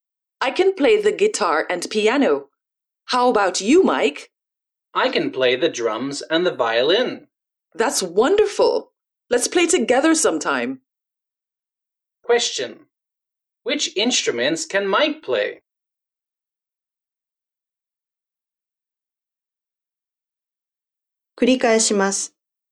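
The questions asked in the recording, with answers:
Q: Which instruments can Mike play?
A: The drums and the violin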